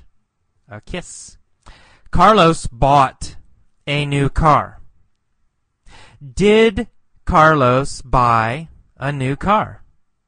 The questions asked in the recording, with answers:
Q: Did Carlos buy a new car?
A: Yes. Yes, of course. He bought a new car.